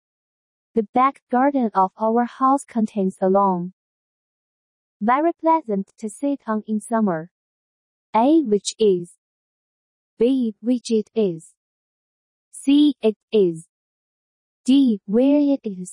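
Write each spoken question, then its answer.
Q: The back garden of our house contains a lawn.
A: A: Which is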